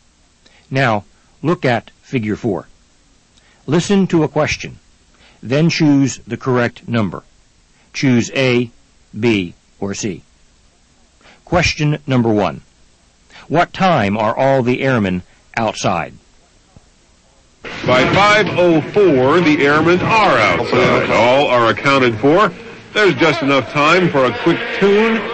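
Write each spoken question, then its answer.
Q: What time are all the airmen outside?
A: By 5:04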